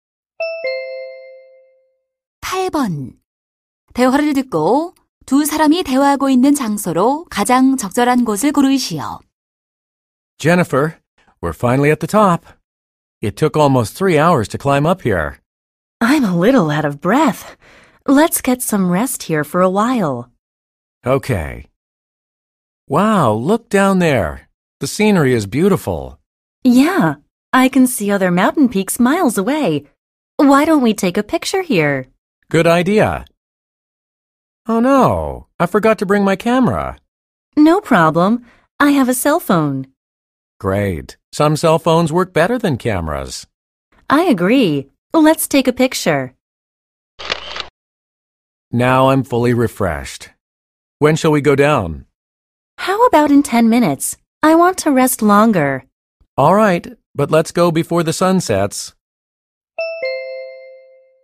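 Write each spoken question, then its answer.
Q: 대화를 듣고 두 사람이 대화하고 있는 장소로 가장 적절한 곳을 고르시오.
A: 산 정상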